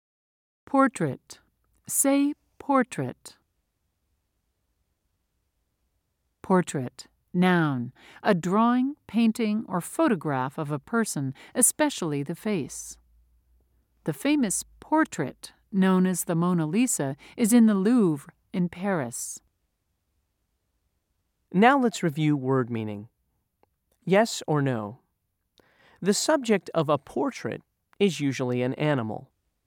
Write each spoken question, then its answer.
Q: Yes or no? The subject of a portrait is usually an animal.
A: If you said no, you were correct.